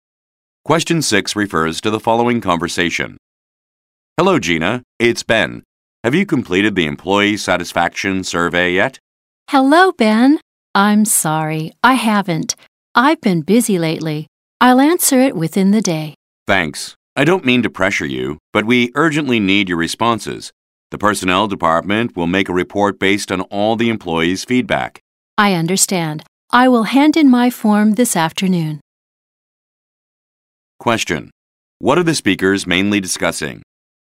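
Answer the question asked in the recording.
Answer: An employee satisfaction survey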